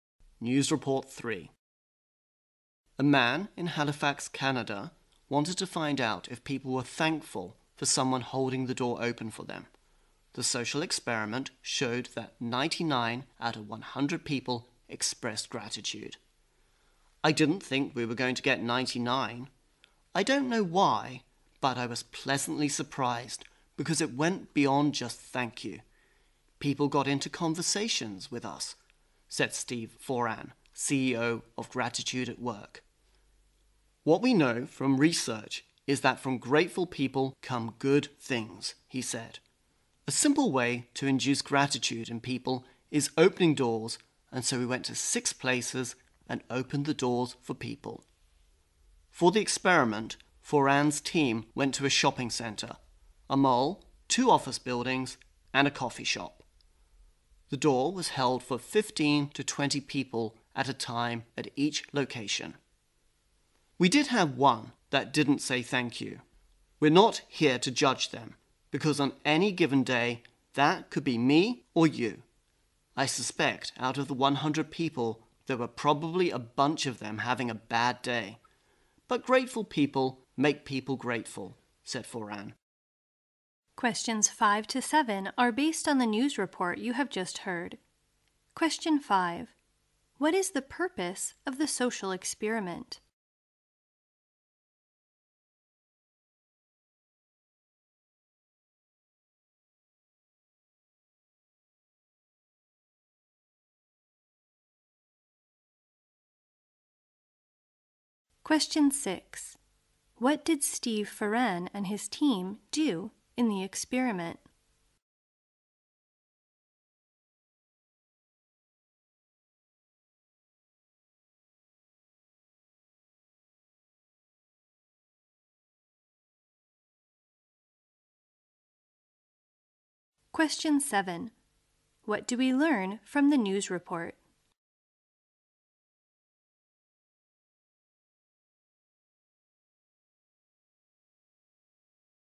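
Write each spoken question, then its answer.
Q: What is the purpose of the social experiment?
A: To find out if people are thankful when someone holds the door open for them

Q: What did Steve Foran and his team do in the experiment?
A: They held doors open for people at 6 places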